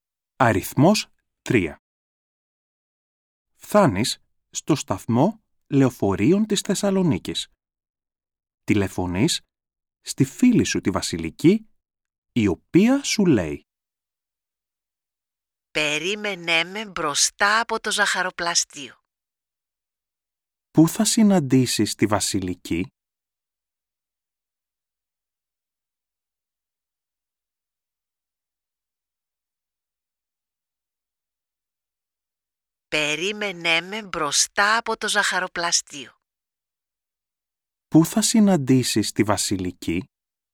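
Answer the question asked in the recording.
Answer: Μπροστά από το ζαχαροπλαστείο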